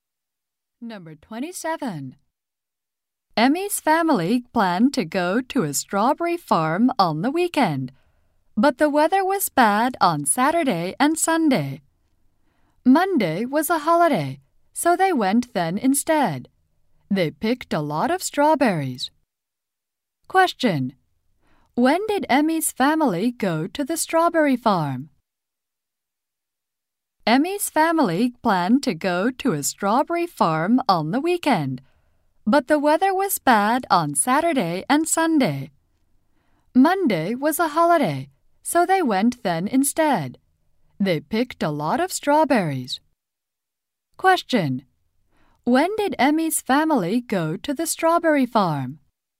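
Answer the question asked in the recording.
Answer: On Monday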